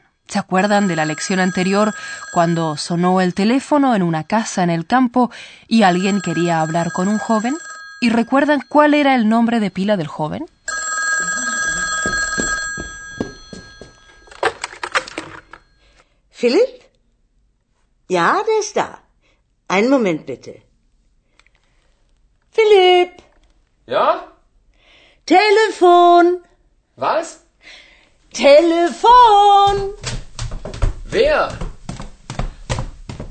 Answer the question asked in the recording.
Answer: De modo que el joven se llama Philip.